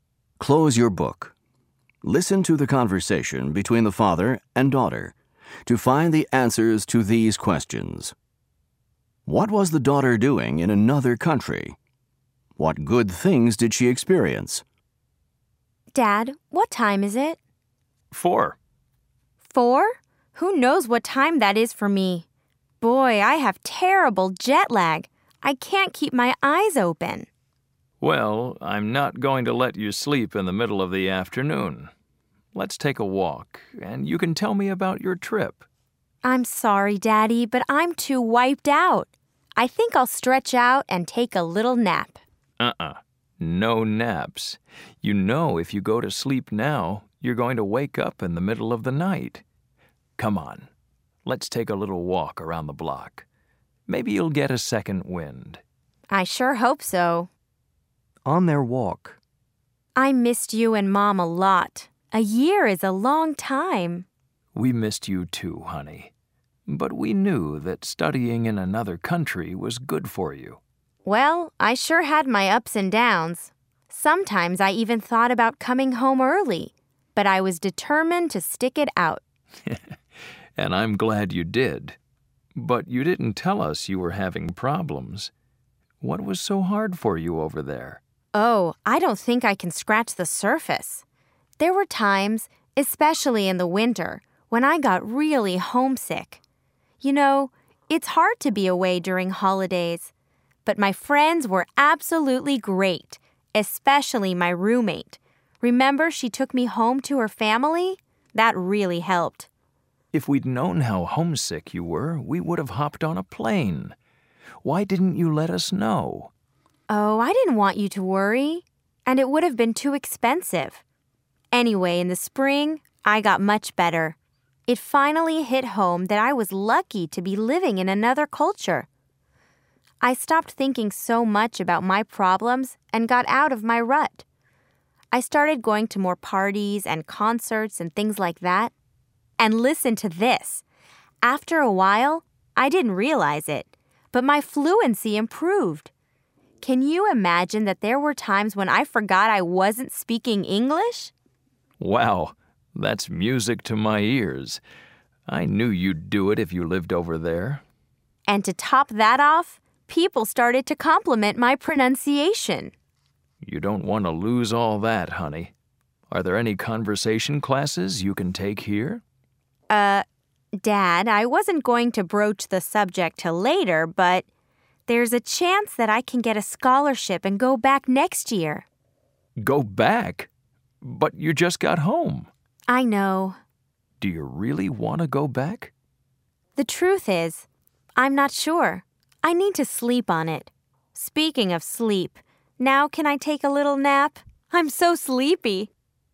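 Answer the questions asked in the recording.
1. Studying (for a year)
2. Great friends (her roommate took her home to her family), she went to parties and concerts, her fluency improved, and people complimented her pronunciation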